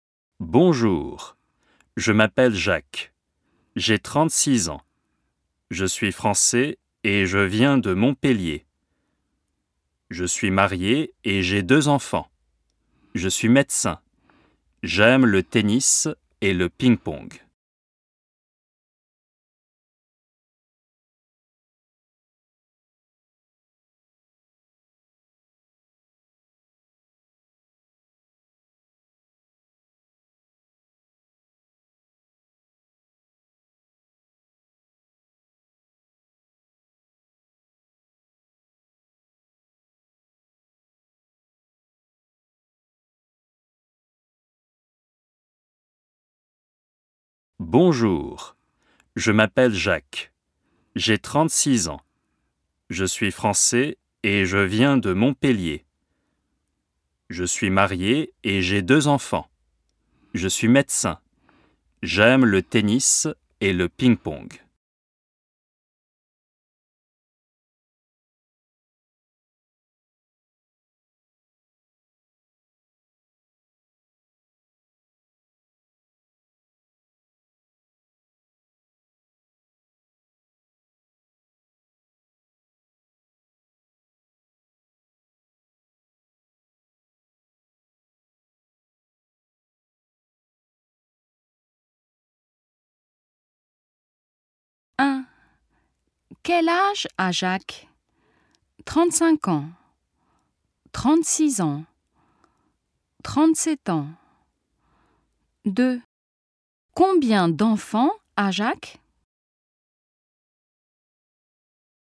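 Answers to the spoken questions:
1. 36 ans
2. deux enfants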